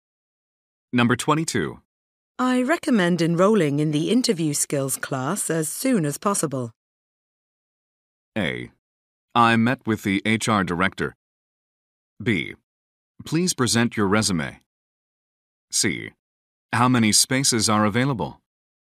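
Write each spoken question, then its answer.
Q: I recommend enrolling in the interview skills class as soon as possible.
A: C: How many spaces are available?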